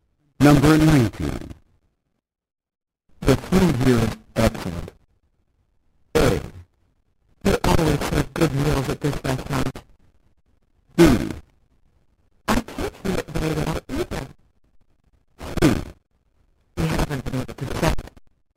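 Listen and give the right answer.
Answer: A: They always serve good meals at this restaurant.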